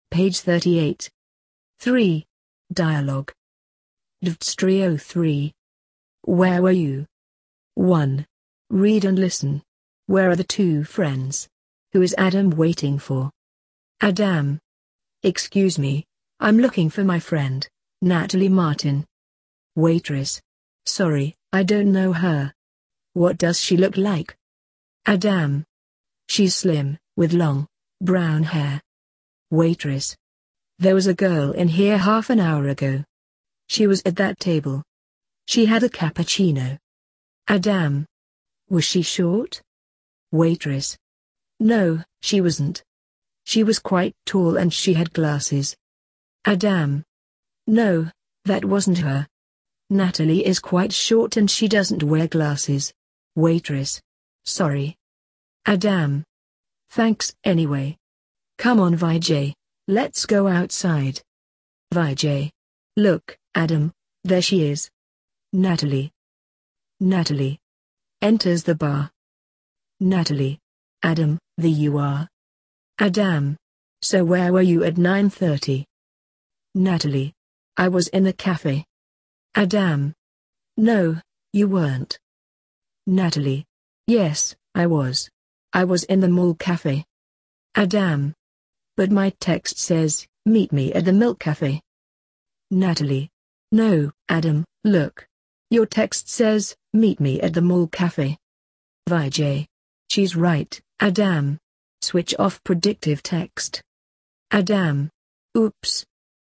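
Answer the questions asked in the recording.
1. In a cafe (the milk cafe)
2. His friend Natalie Martin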